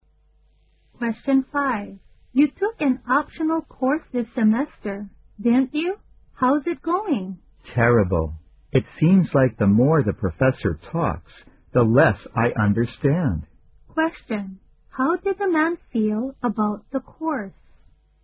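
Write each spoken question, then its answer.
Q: How did the man feel about the course?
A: He finds it terrible and hard to understand.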